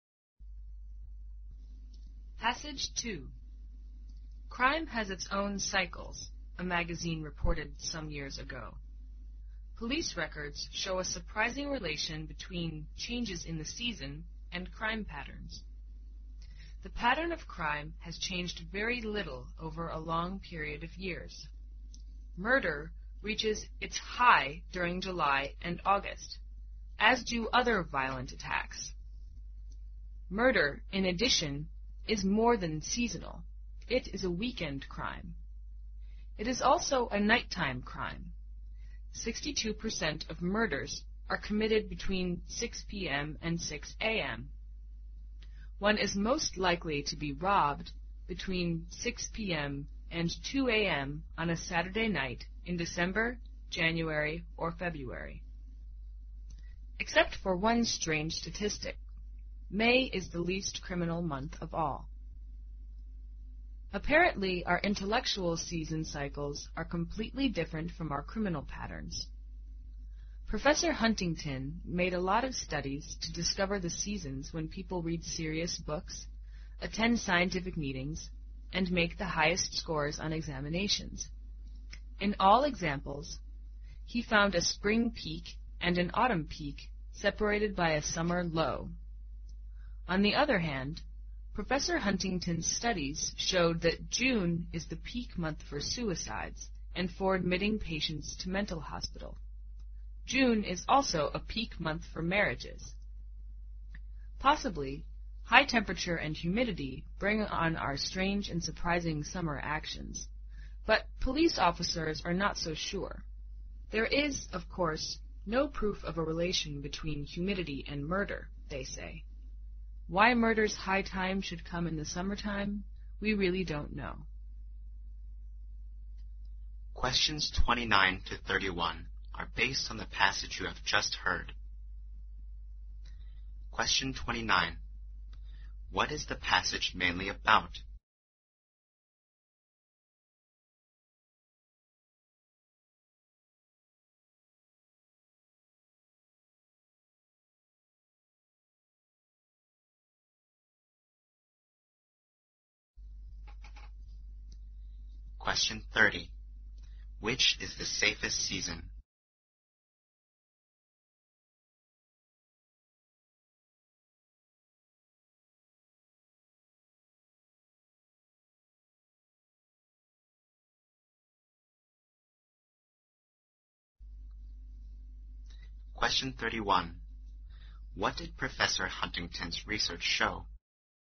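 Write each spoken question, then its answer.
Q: Which is the safest season?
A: Spring (May is the least criminal month)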